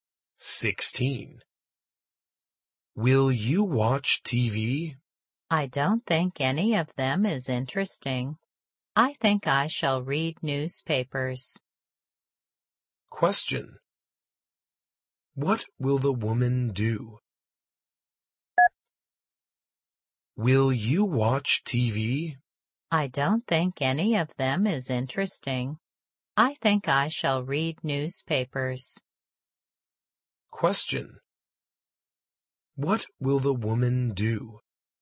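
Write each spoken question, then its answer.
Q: What will the woman do?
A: Read newspapers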